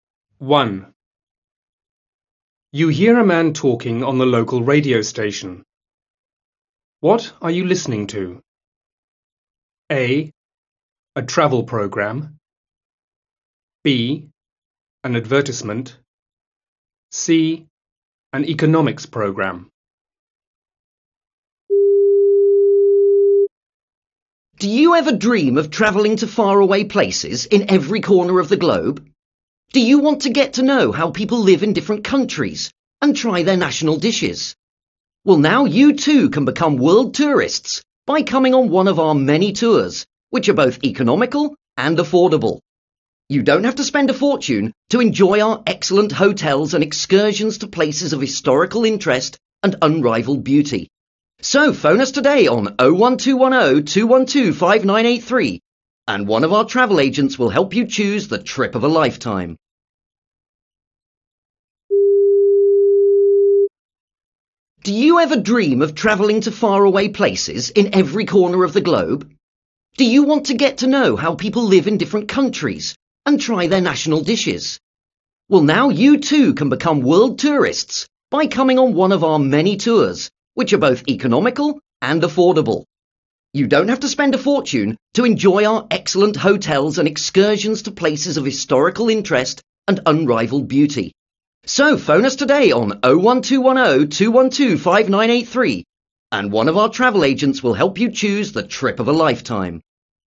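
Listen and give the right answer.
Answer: B: An advertisement.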